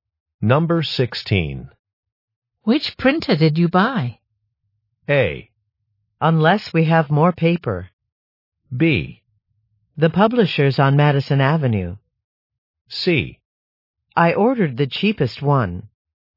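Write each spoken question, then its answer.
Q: Which printer did you buy?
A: C: I ordered the cheapest one.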